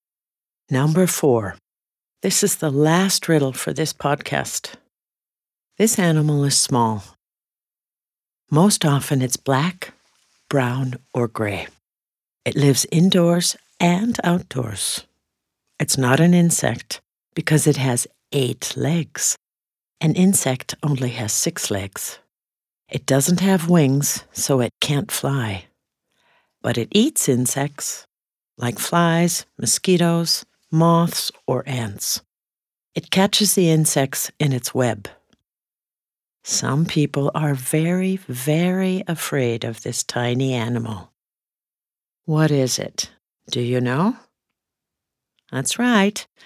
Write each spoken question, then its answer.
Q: What is it? Do you know?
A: It's a spider.